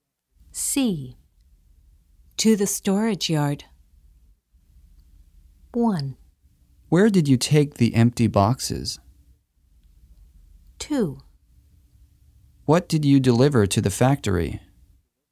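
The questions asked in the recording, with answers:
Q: To the storage yard.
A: 1: Where did you take the empty boxes?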